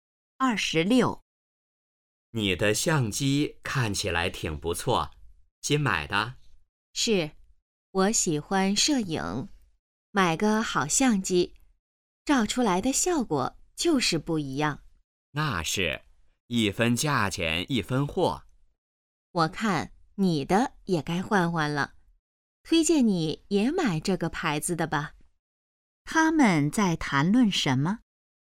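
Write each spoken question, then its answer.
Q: 他们在谈论什么?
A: 相机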